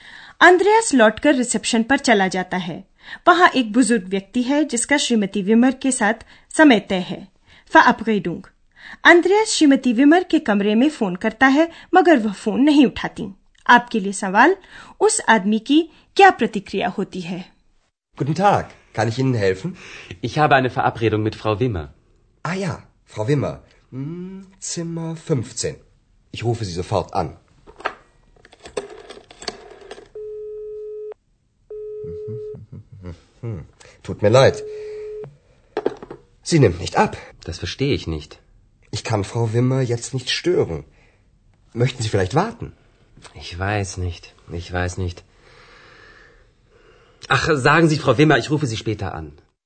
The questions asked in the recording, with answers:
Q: उस आदमी की क्या प्रतिक्रिया होती है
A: वह आदमी श्रीमती विमर के लिए यह सूचना छोड़ देता है कि वह बाद में फिर फोन करेगा